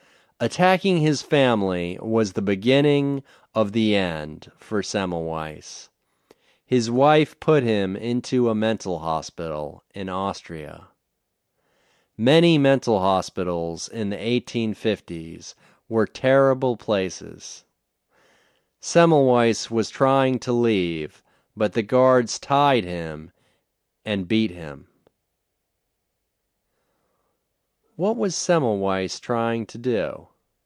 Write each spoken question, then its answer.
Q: What was Semmelweis trying to do?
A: Semmelweis was trying to leave.